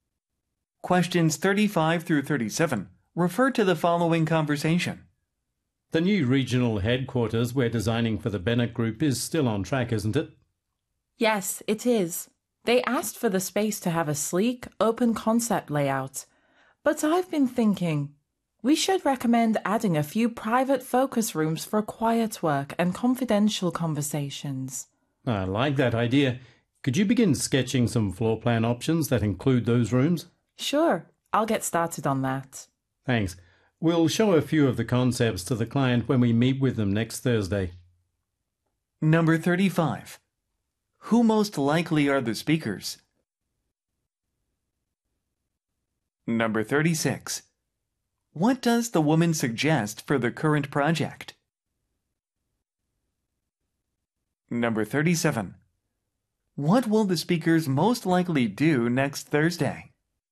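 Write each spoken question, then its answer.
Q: Who most likely are the speakers?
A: Architects/designers

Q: What will the speakers most likely do next Thursday?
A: Show design concepts to the client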